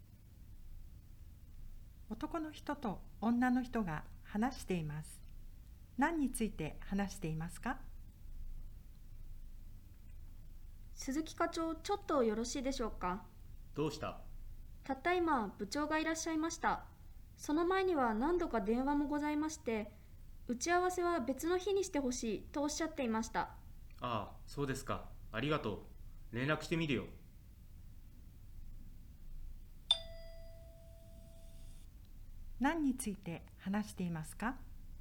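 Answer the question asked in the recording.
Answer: 部長が打ち合わせを別の日にしてほしいと言っていたこと(打ち合わせの日の変更)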